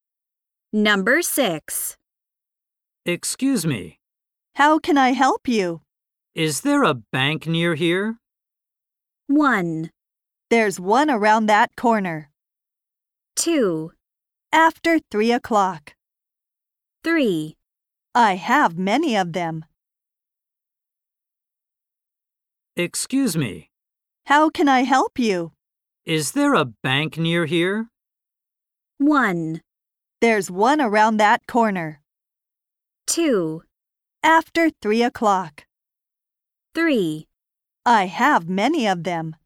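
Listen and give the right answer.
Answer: 1: There's one around that corner.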